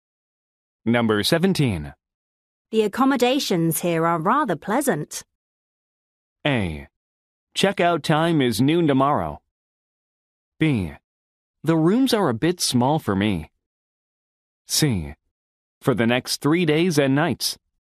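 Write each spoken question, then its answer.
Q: The accommodations here are rather pleasant.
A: B: The rooms are a bit small for me.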